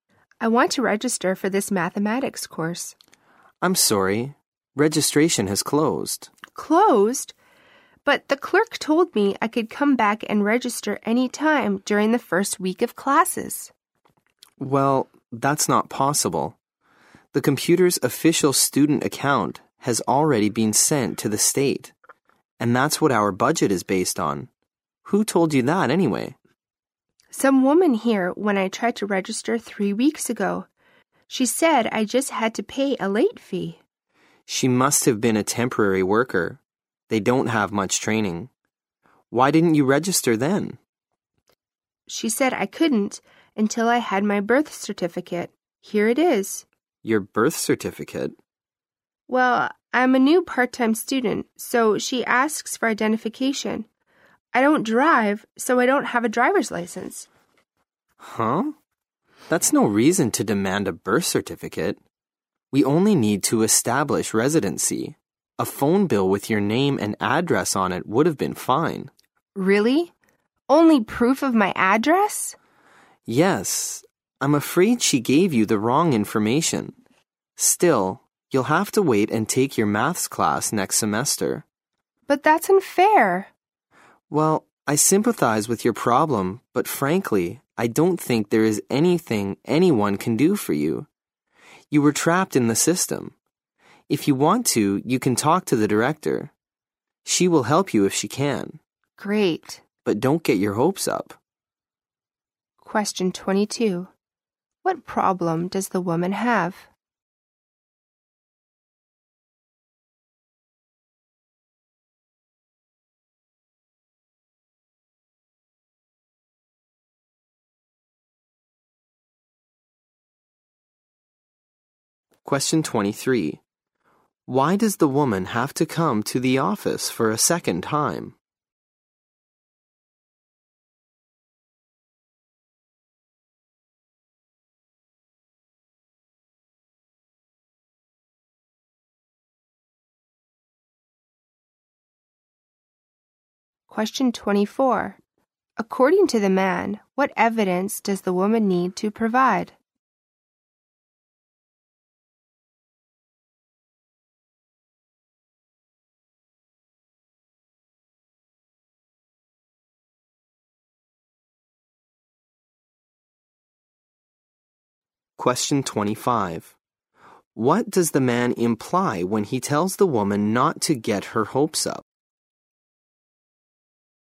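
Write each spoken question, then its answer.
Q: What problem does the woman have?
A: She can't register for the math course because registration has closed.

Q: Why does the woman have to come to the office for a second time?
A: She was told she needed her birth certificate to register.

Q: According to the man, what evidence does the woman need to provide?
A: Proof of her address, such as a phone bill with her name and address.

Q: What does the man imply when he tells the woman not to get her hopes up?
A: The director probably can't help her.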